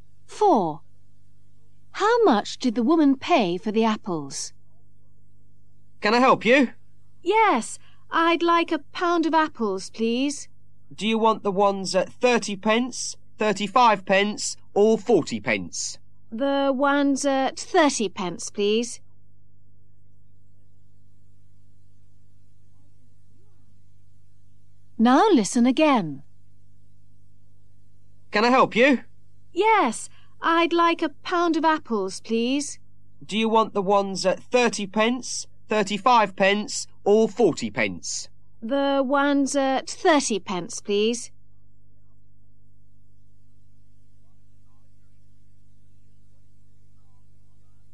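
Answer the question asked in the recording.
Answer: 30 pence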